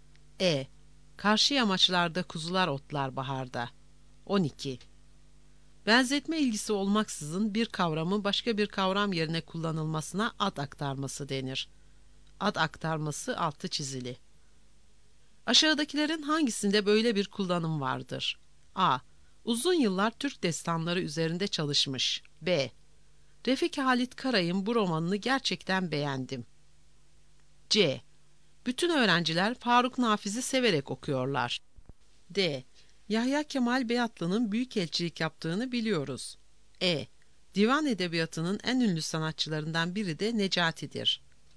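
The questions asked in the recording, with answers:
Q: Aşağıdakilerin hangisinde böyle bir kullanım vardır?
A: C: Bütün öğrenciler Faruk Nafiz'i severek okuyorlar.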